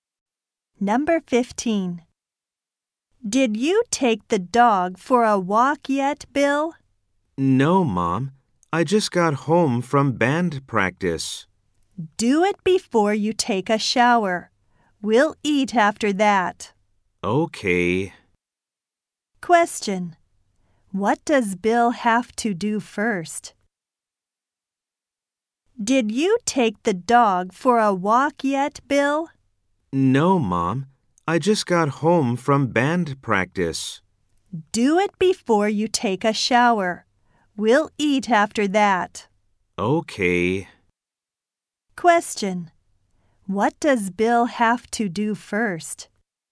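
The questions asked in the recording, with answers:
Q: What does Bill have to do first?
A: Take the dog for a walk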